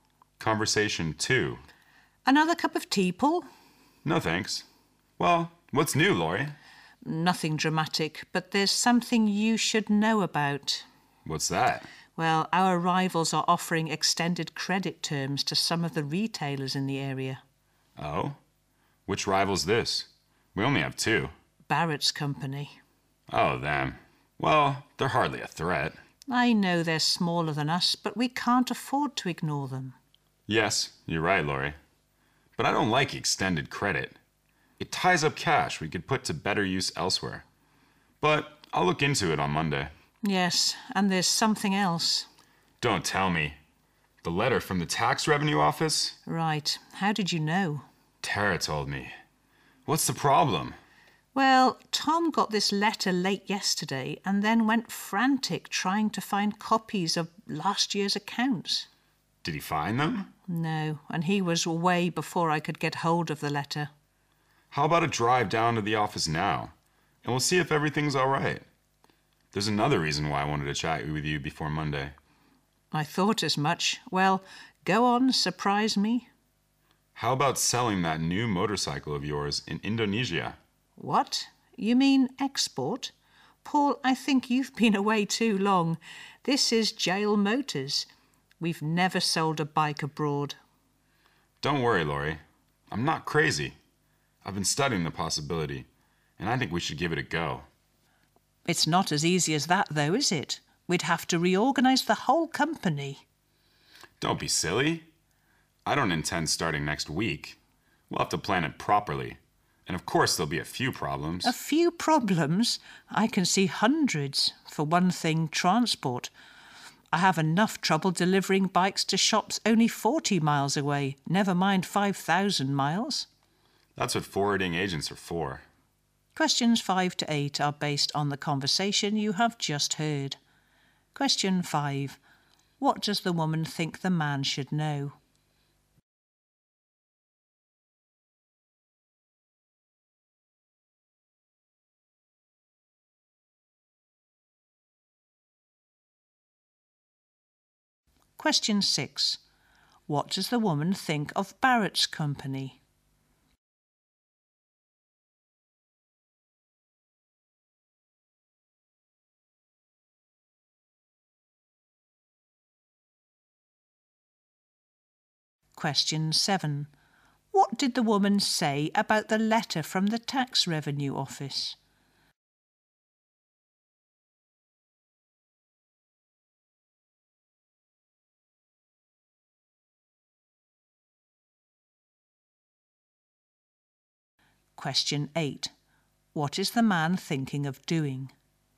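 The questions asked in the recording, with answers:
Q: What does the woman think the man should know?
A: Their rival is offering extended credit terms to retailers

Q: What does the woman think of Barrett's company?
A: It is smaller, but they can't afford to ignore it

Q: What did the woman say about the letter from the tax revenue office?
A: Tom got it late yesterday and couldn't find copies of last year's accounts

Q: What is the man thinking of doing?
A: Selling their new motorcycle in Indonesia (exporting)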